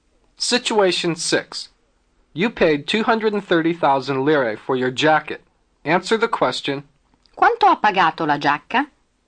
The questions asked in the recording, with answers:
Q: "Quanto ha pagato la giacca?"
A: L'ho pagata 230,000 lire.